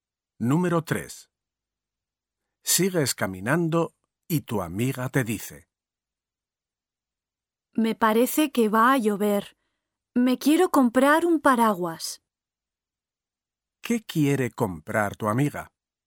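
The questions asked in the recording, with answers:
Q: ¿Qué quiere comprar tu amiga?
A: un paraguas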